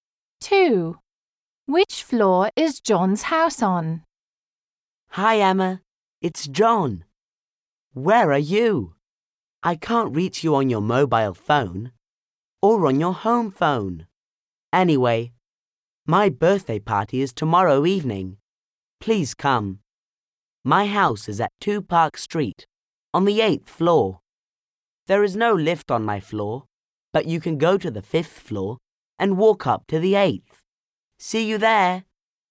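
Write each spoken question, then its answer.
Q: Which floor is John's house on?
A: The 8th floor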